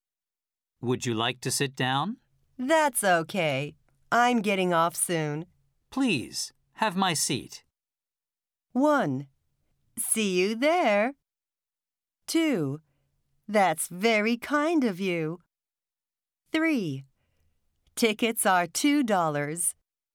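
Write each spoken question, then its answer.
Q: Please, have my seat.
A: 2: That's very kind of you.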